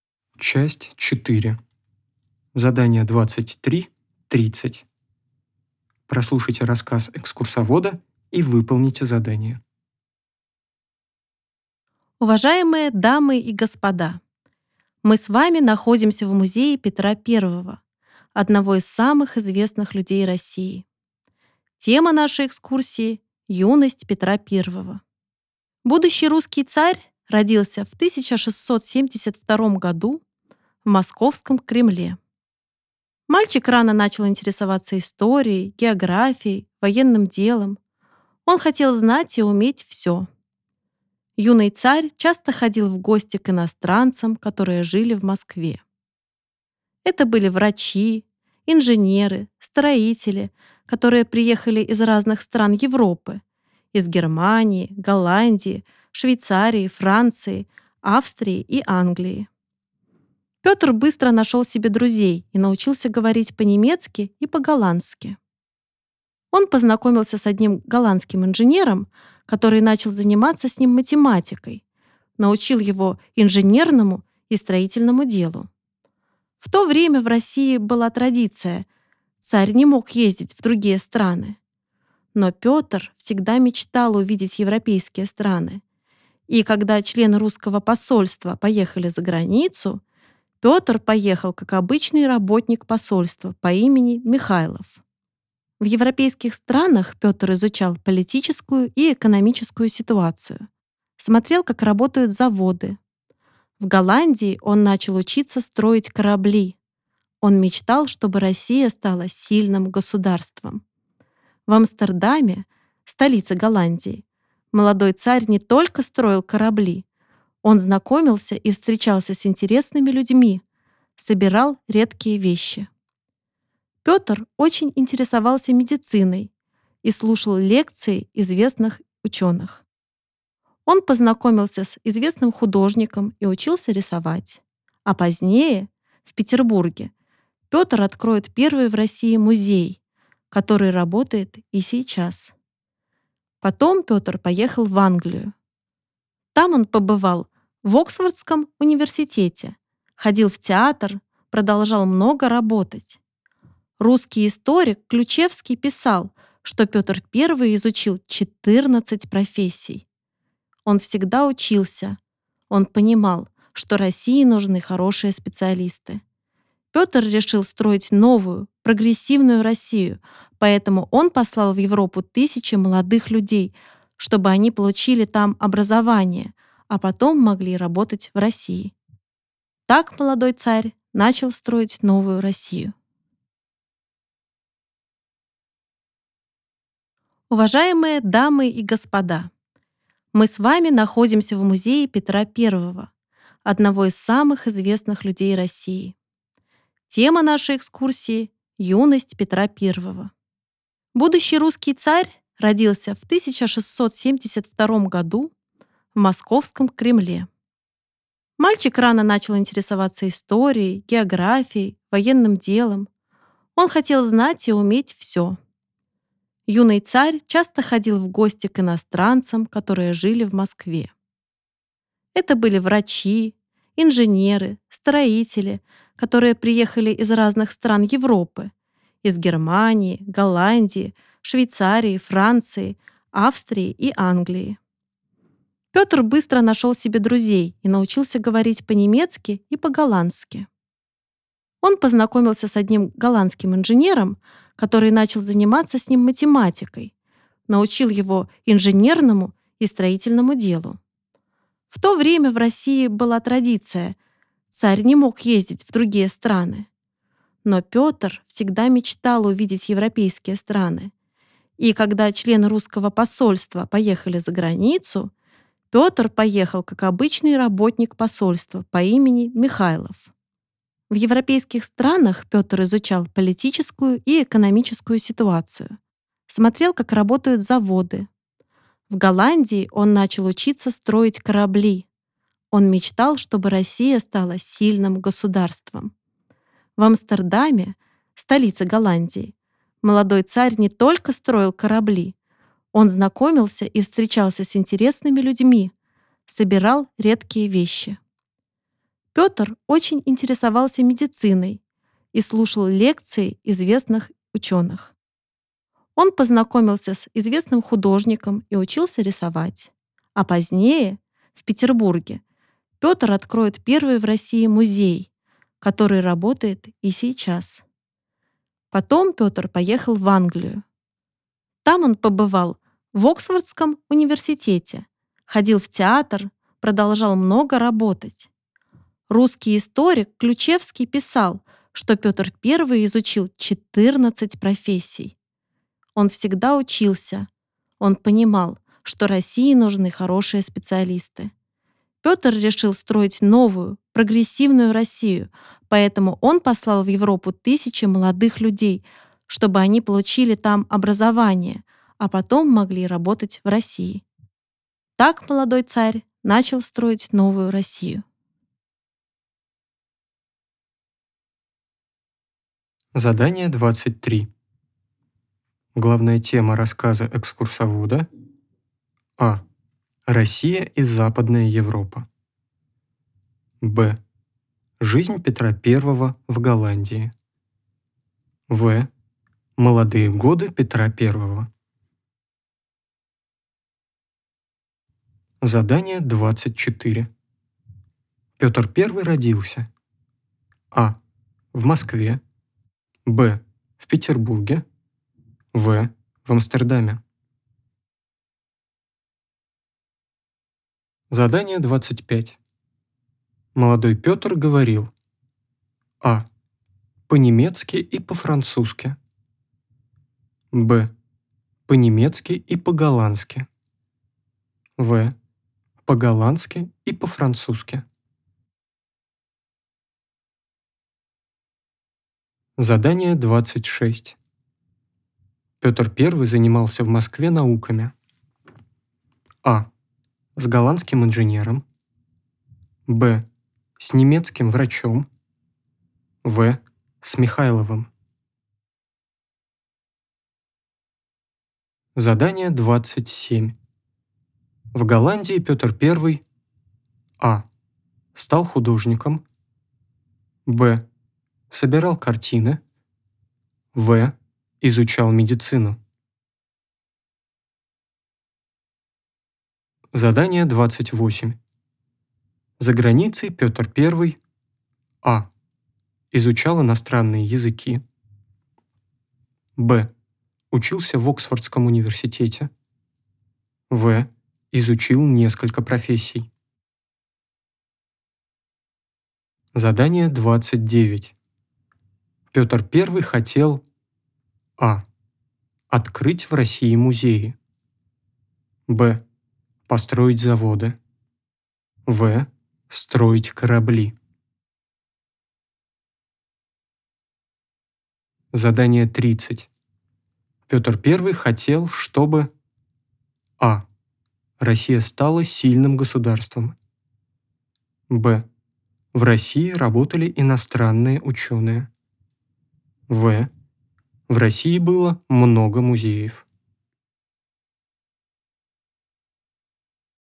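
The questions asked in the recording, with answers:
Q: Главная тема рассказа экскурсовода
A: В: Молодые годы Петра I.

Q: Петр I родился.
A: А: В Москве.

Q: Молодой Петр говорил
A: Б: По-немецки и по-голландски.

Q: Петр I занимался в Москве науками.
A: А: С голландским инженером.

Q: За границей Петр I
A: В: Изучил несколько профессий.

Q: Петр I хотел, чтобы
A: А: Россия стала сильным государством.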